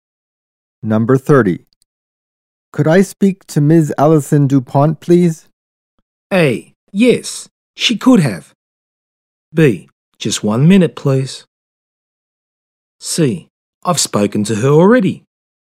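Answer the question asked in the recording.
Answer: B: Just 1 minute, please.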